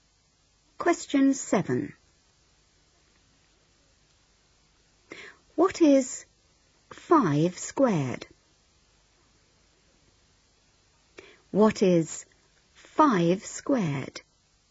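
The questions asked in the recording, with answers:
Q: What is 5 squared?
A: 25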